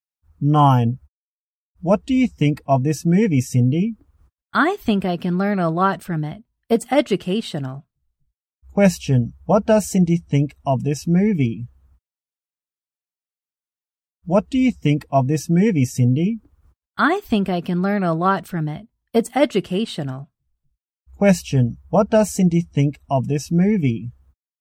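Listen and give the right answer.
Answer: It's educational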